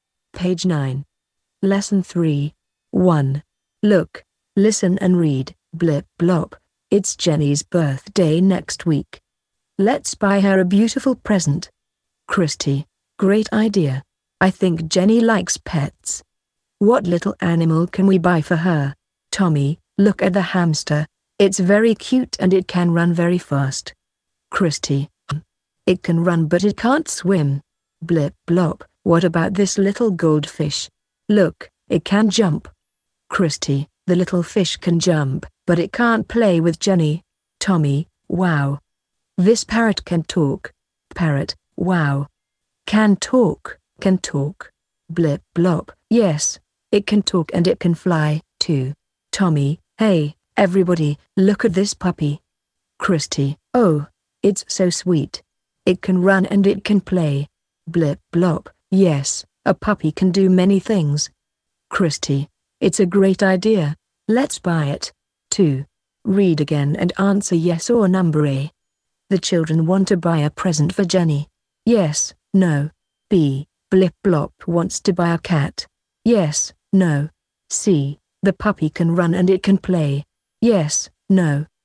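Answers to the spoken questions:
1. Yes
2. No
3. Yes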